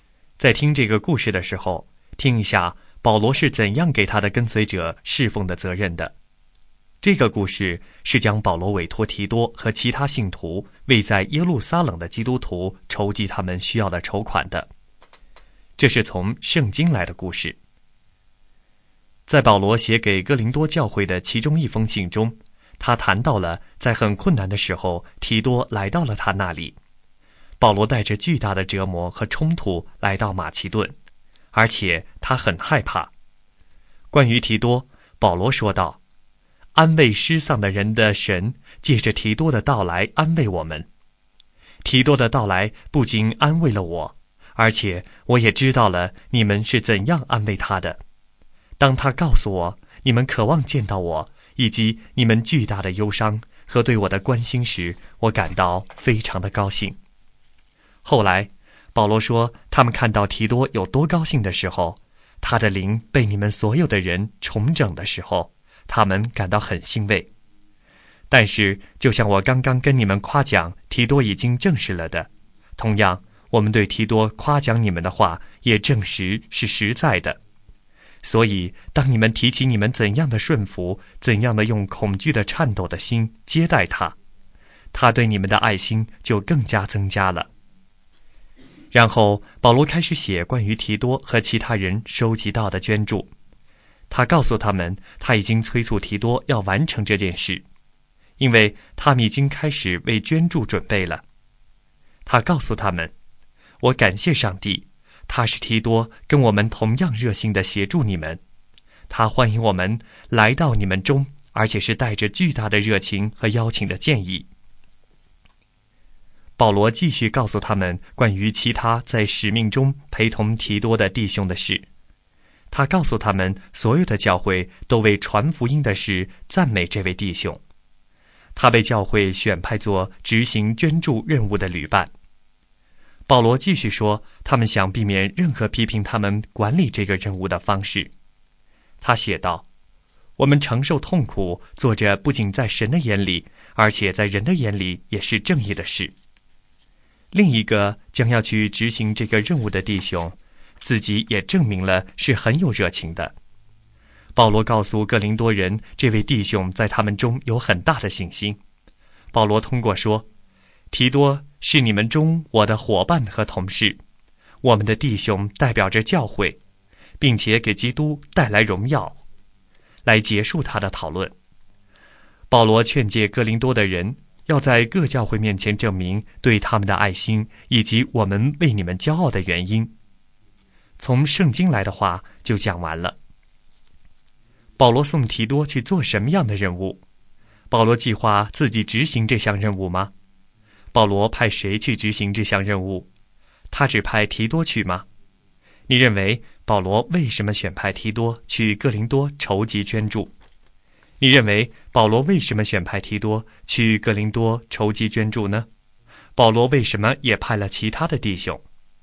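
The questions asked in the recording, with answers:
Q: 保罗送提多去做什么样的任务?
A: 为耶路撒冷的基督徒筹集捐款

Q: 保罗派谁去执行这项任务?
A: 提多和其他弟兄

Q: 他只派提多去吗?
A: 不是,还派了其他弟兄

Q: 保罗为什么也派了其他的弟兄?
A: 为了避免别人批评他们管理捐款的方式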